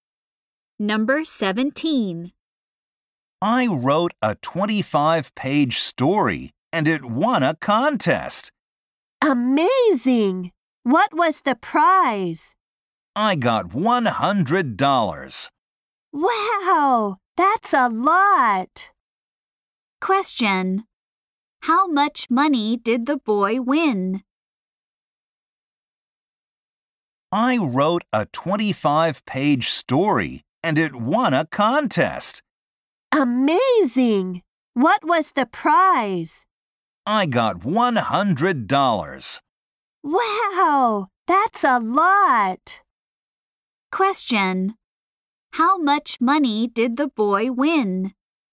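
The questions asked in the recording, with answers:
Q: How much money did the boy win?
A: $100.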